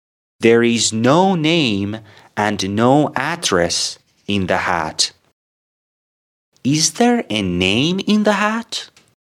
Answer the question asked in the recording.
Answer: No, of course not. There is no name in the hat.